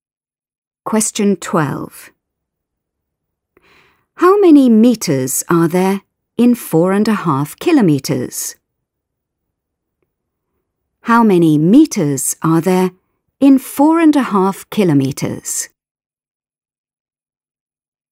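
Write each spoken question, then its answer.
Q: How many meters are there in 4.5 kilometres?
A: 4500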